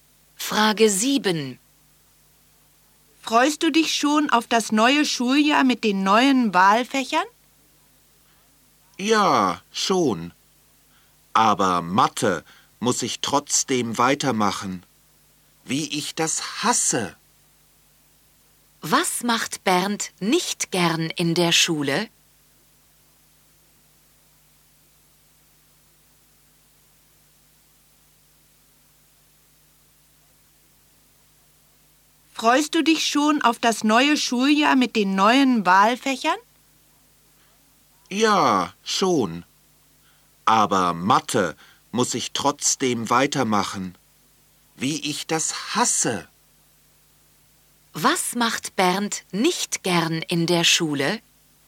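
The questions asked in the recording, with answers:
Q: Was macht Bernd nicht gern in der Schule?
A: Mathe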